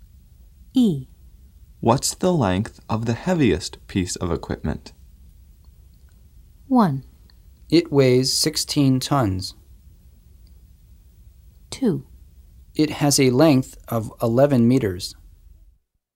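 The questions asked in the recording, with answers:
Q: What's the length of the heaviest piece of equipment?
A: 2: It has a length of 11 meters.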